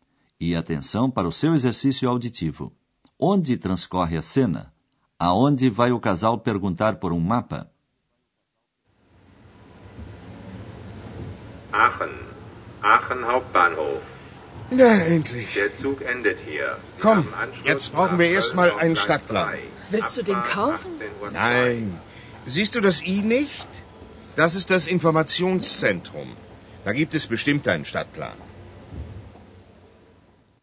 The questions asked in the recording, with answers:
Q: Onde transcorre a cena?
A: a cena transcorre na estação central de trens de Aachen.

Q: Aonde vai o casal perguntar por um mapa?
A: Como na maioria das cidades grandes, ali existe um centro de informações.